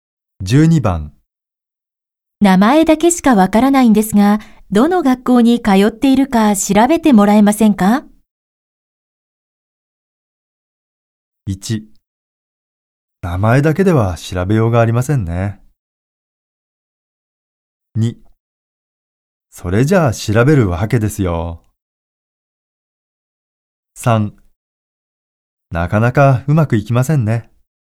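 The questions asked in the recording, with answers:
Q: 名前だけしかわからないんですが、どの学校に通っているか 調べてもらえませんか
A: 1: 名前だけでは調べようがありませんね。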